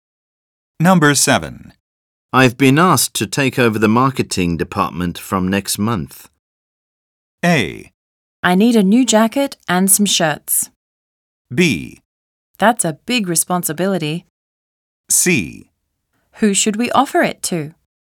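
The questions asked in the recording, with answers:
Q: I've been asked to take over the marketing department from next month.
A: B: That's a big responsibility.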